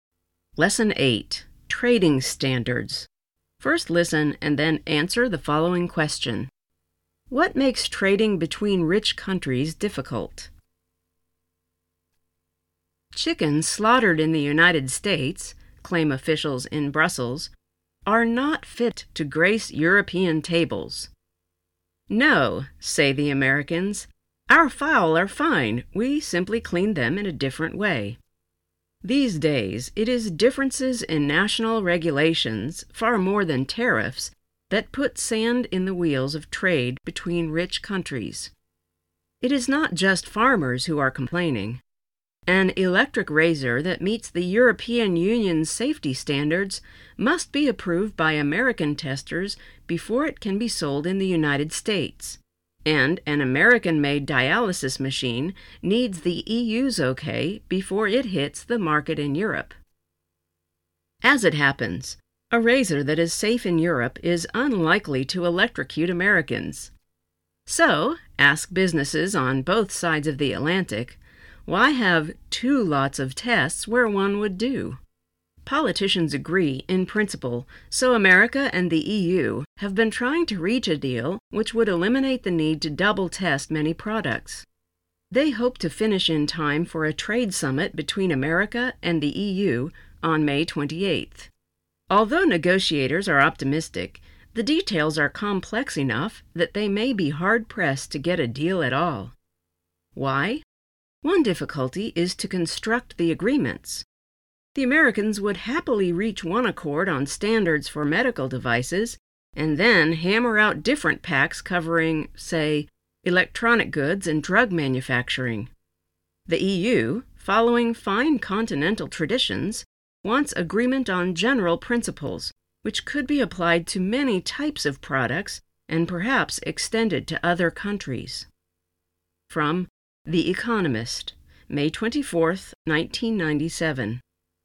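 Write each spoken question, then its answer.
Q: What makes trading between rich countries difficult?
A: Differences in national regulations (far more than tariffs)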